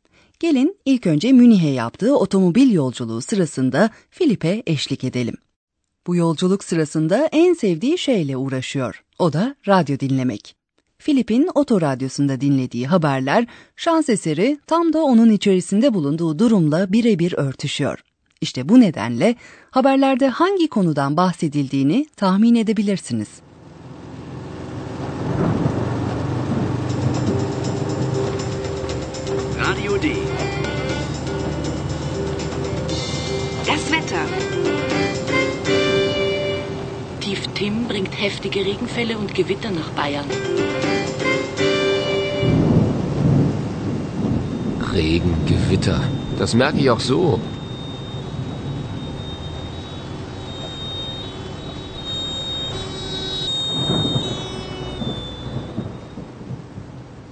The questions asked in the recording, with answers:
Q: İşte bu nedenle haberlerde hangi konudan bahsedildiğini tahmin edebilirsiniz.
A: Haberlerin konusu hava durumuydu.